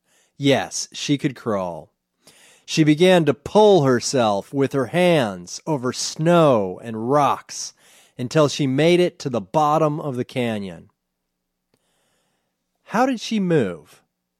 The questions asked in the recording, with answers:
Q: How did she move?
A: She pulled herself with her hands.